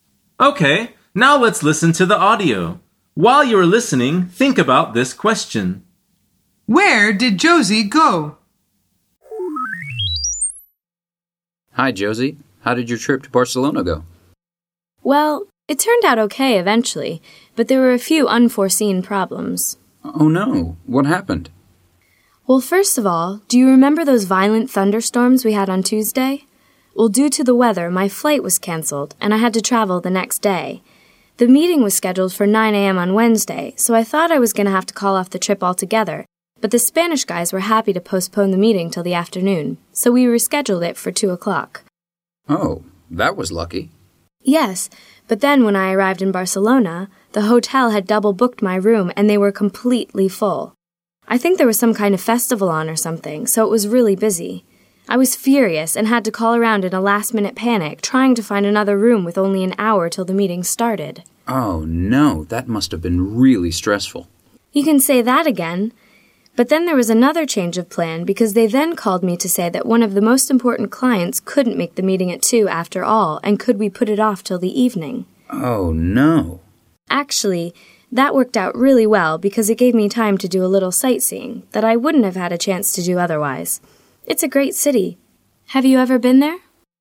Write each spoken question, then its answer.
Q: Where did Josie go?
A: Where did Josie go? The answer is Barcelona.